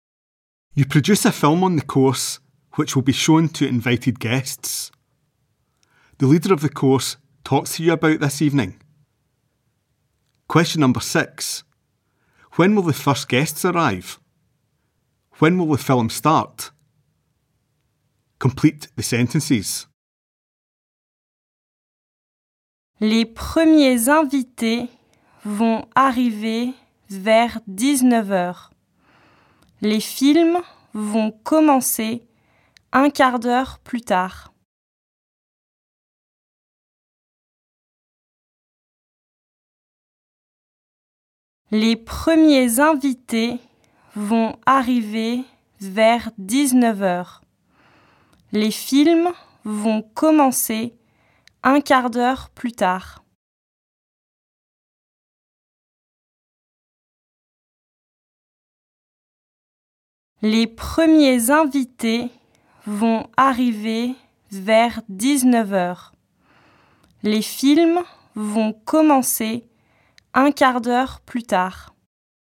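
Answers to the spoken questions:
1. Around 7 pm
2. A quarter of an hour later (7:15 pm)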